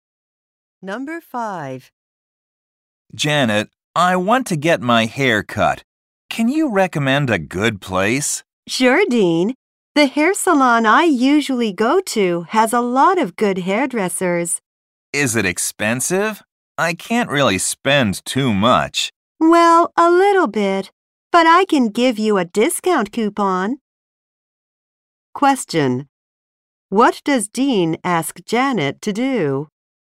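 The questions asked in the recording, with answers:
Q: What does Dean ask Janet to do?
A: Recommend a good hair salon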